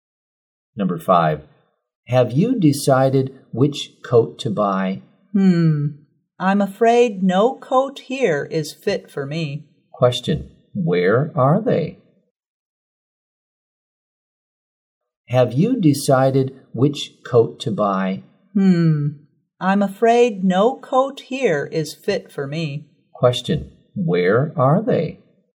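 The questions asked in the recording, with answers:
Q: Question, where are they?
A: In a clothes store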